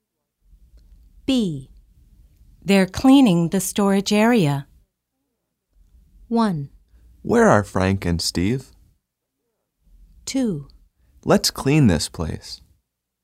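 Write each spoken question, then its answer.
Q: They're cleaning the storage area.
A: 1: Where are Frank and Steve?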